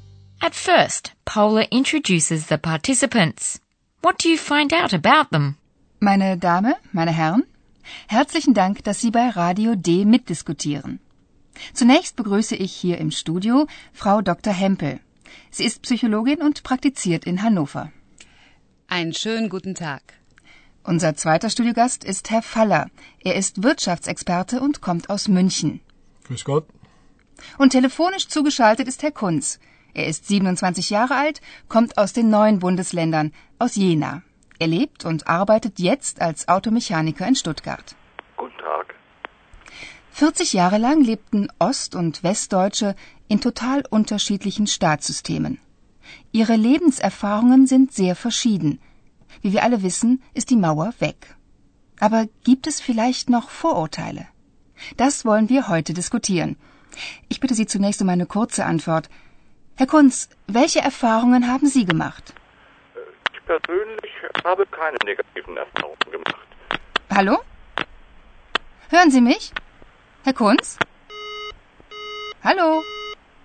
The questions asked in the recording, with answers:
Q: What do you find out about them?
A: First, Paula welcomes Frau Hempel, a psychologist who practices in the North German city of Hanover.